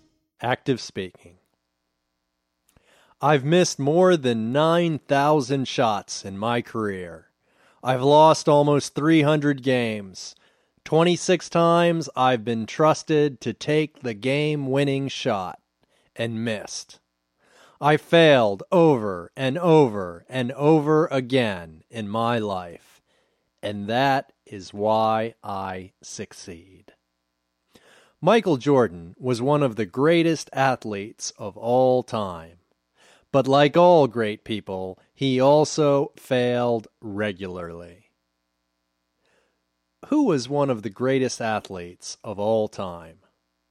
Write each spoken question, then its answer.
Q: Who was one of the greatest athletes of all time?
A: Michael Jordan was one of the greatest athletes of all time.